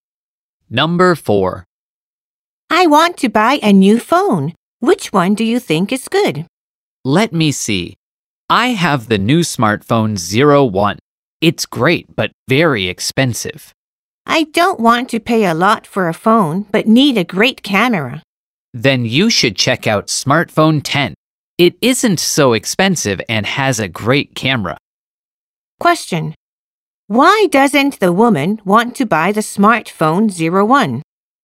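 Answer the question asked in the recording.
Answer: Because it is very expensive.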